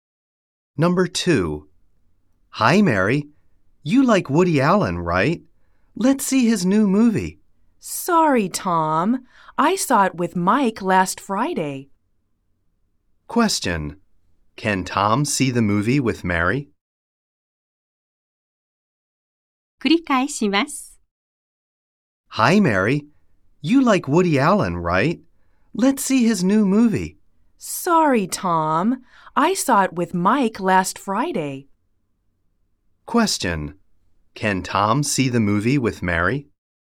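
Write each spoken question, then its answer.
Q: Can Tom see the movie with Mary?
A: No, he can't.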